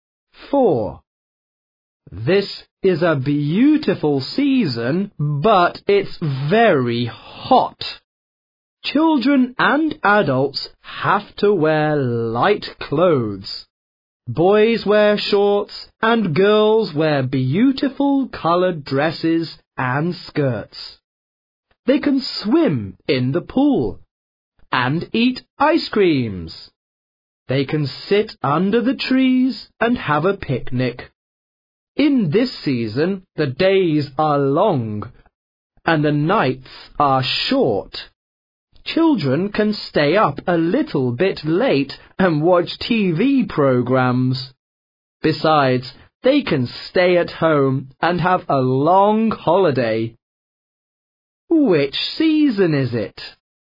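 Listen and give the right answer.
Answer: summer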